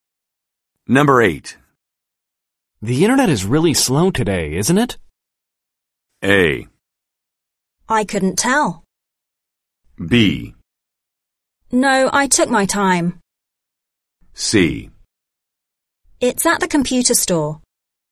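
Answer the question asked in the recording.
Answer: A: I couldn't tell.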